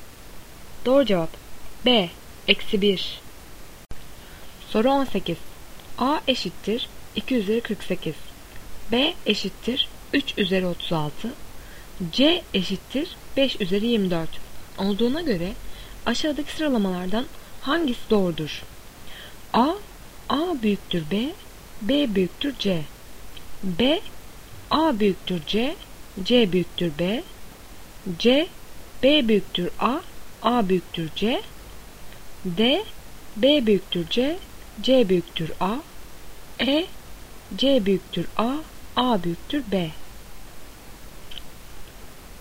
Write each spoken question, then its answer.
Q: Olduğuna göre aşağıdaki sıralamalardan hangisi doğrudur?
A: Doğru cevap D, B büyüktür C, C büyüktür A.